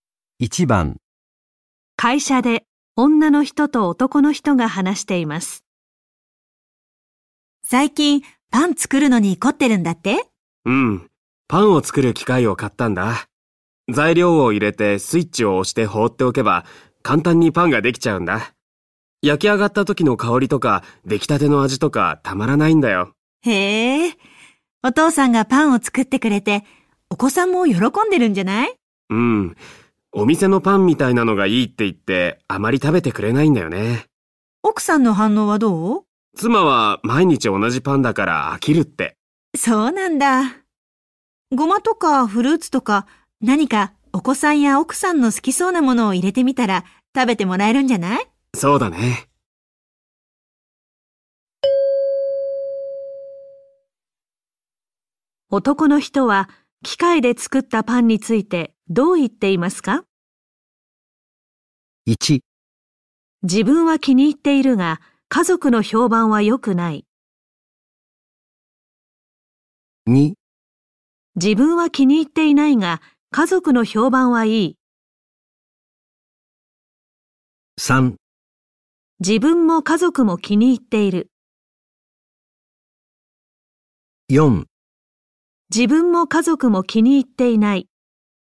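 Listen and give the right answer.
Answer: 1: 自分は気に入っているが家族の評判は良くない。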